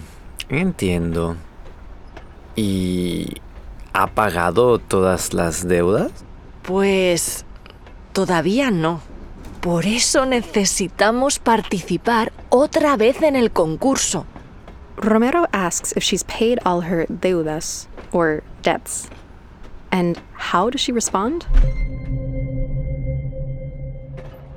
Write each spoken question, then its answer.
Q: And how does she respond?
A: Todavía no, Martina says.